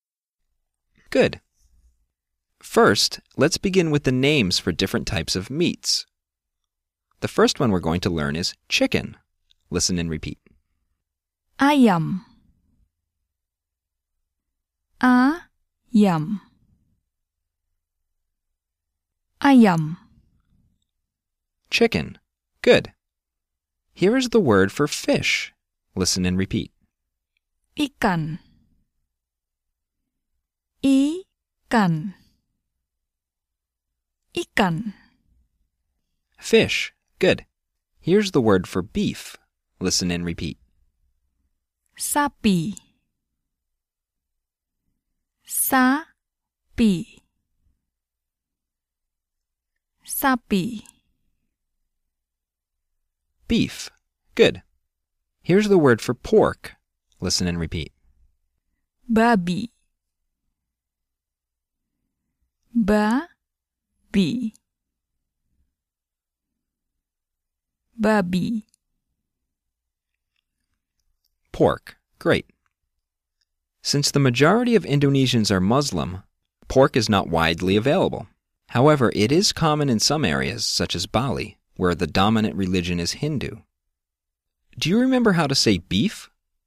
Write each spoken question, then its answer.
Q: Do you remember how to say beef?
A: Sapi.